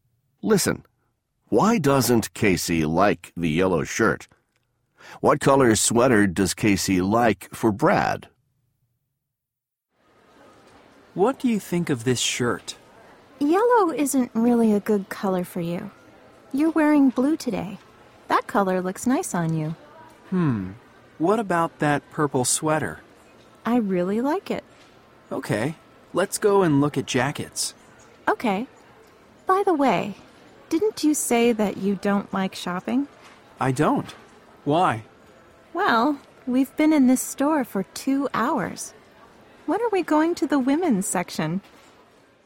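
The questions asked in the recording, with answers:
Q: Why doesn't Casey like the yellow shirt?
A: Yellow isn't really a good color for Brad.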